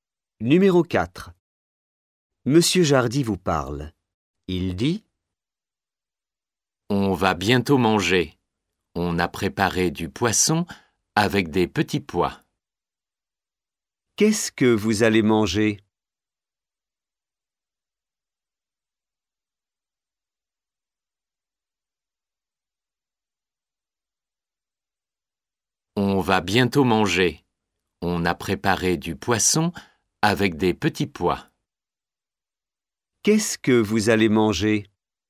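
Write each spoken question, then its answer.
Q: Qu'est-ce que vous allez manger ?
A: Du poisson avec des petits pois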